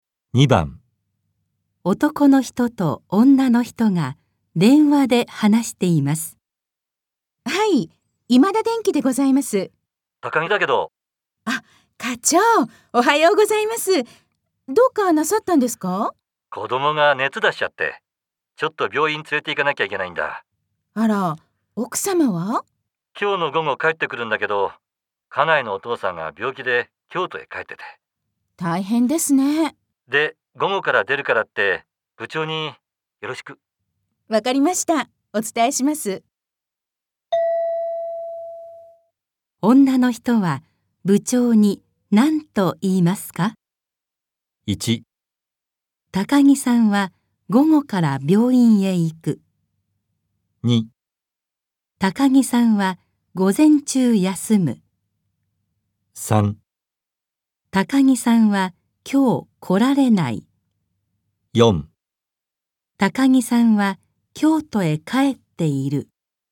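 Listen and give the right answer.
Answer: 2: 高木さんは午前中休む。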